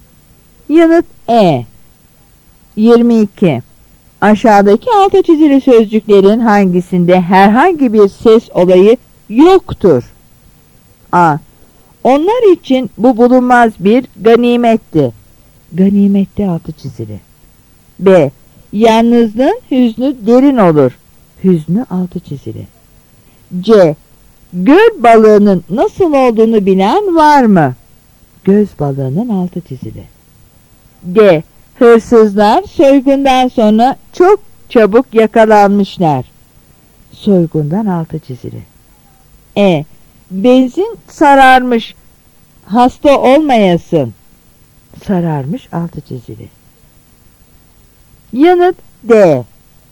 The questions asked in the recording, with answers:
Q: Aşağıdaki altı çizili sözcüklerin hangisinde herhangi bir ses olayı yoktur?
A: Yanıt D.